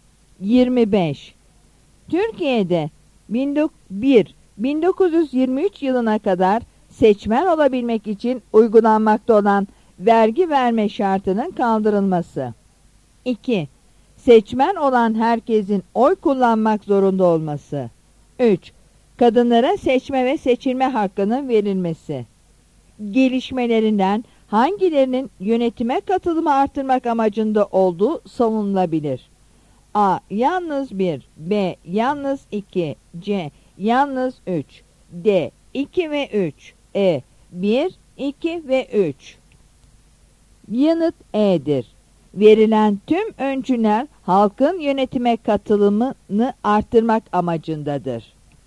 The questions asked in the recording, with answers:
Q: Gelişmelerinden hangilerinin yönetime katılımı artırmak amacında olduğu savunulabilir?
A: Yanıt E'dir.